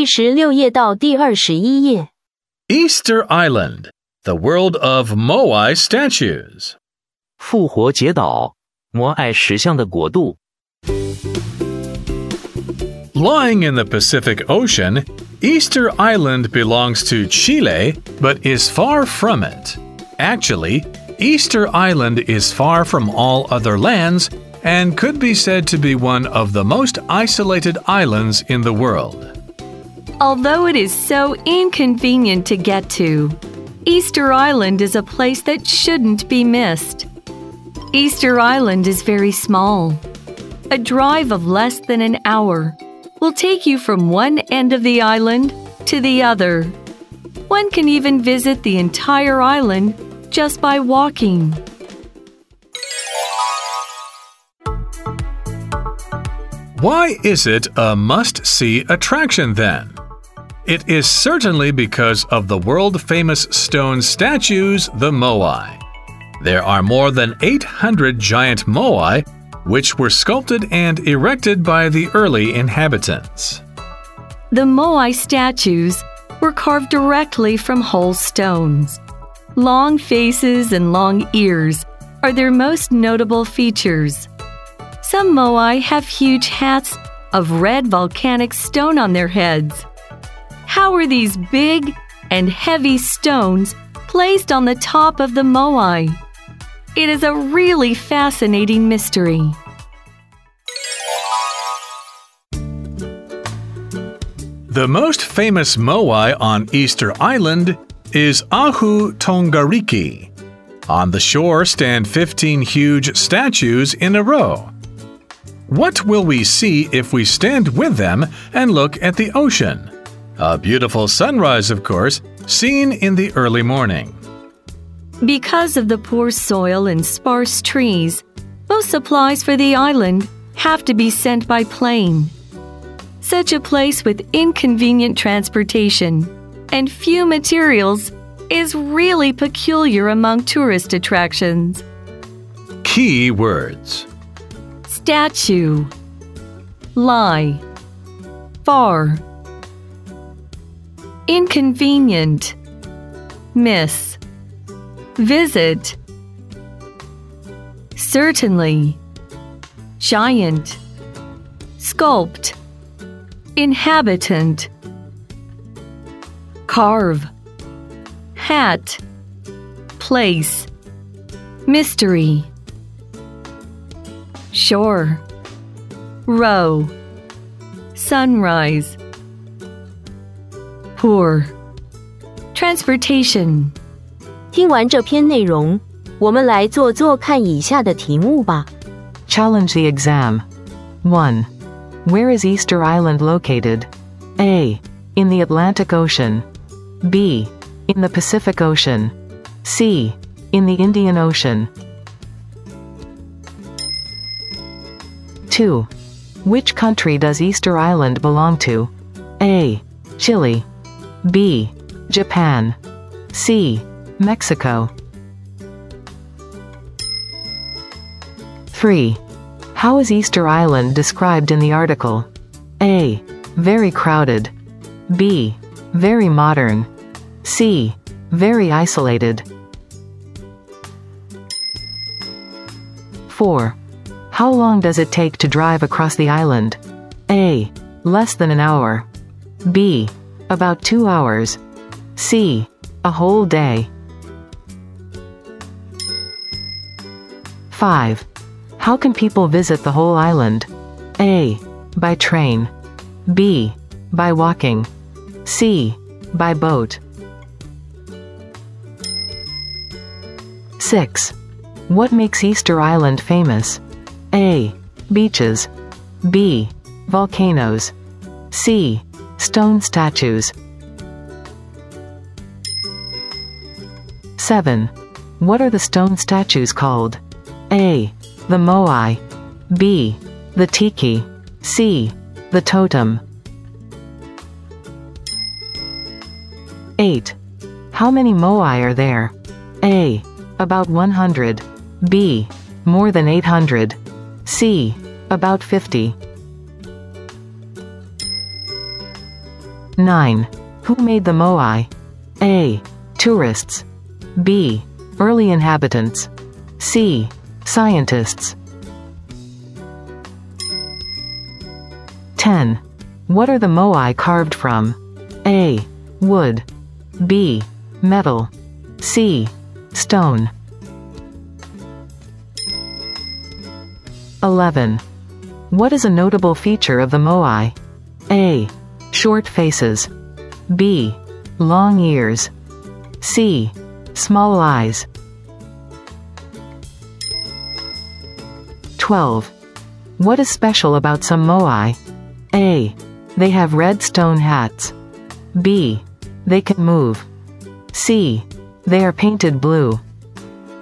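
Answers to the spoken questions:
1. B: In the Pacific Ocean.
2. A: Chile.
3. C: Very isolated.
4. A: Less than an hour.
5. B: By walking.
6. C: Stone statues.
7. A: The Moai.
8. B: More than 800.
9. B: Early inhabitants.
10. C: Stone.
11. B: Long ears.
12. A: They have red stone hats.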